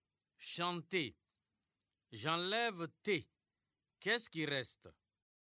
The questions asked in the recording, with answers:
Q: chanter. J'enlève T. Qu'est-ce qui reste?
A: Monsieur, il reste chant.